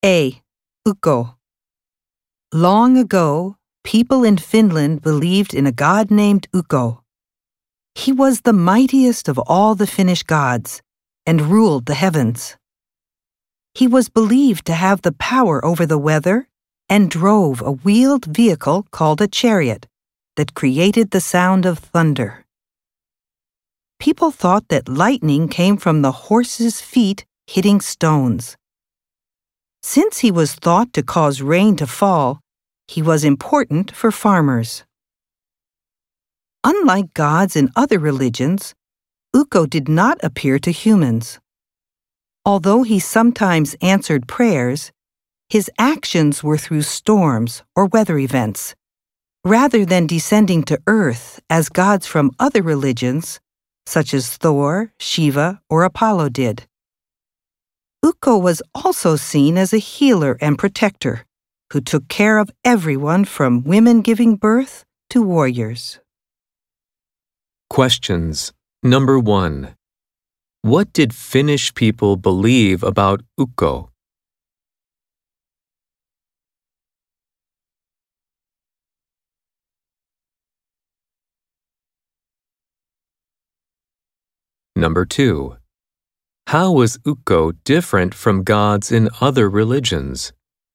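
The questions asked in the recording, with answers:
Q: how was Ukko different from gods in other religions?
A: He did not appear to humans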